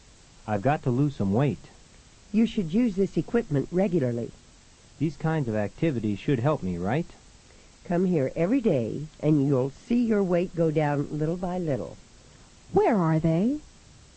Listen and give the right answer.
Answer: Number 1 is C. They are at a gym.